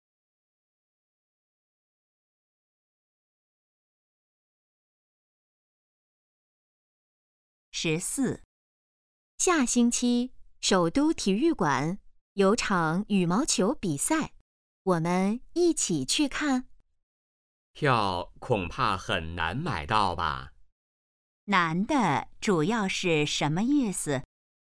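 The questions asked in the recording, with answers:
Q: 难的主要是什么意思?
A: 票很难买到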